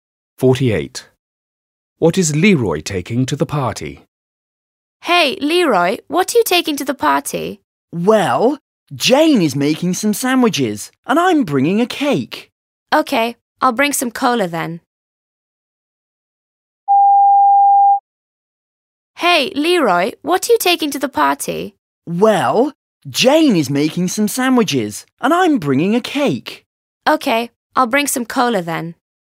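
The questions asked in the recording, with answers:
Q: What is Leroy taking to the party?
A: a cake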